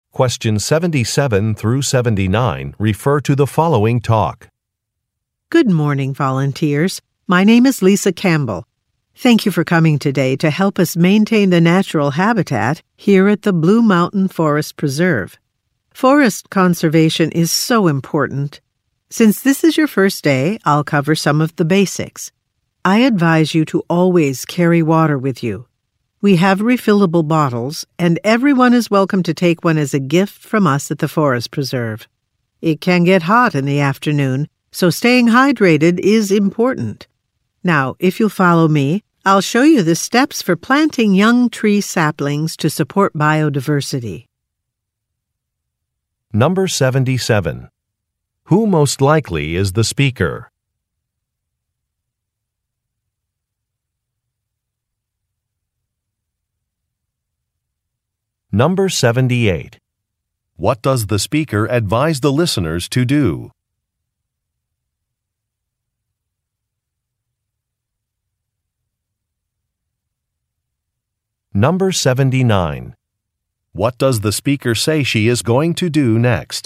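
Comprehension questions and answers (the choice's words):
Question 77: Who most likely is the speaker?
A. An archaeologist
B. A marine biologist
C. A conservation expert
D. An athletic trainer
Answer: A conservation expert

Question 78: What does the speaker advise the listeners to do?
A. Take a water bottle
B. Consult a site map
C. Apply sunscreen regularly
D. Write careful notes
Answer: Take a water bottle

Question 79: What does the speaker say she is going to do next?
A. Answer some questions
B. Demonstrate a process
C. Introduce a colleague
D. Take the listeners to lunch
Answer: Demonstrate a process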